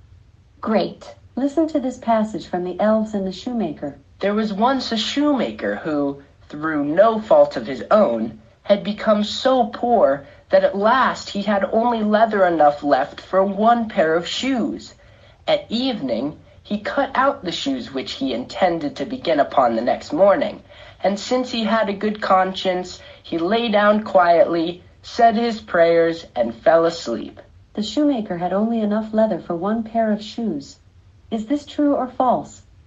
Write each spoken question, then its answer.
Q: The shoemaker had only enough leather for one pair of shoes. Is this true or false?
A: True.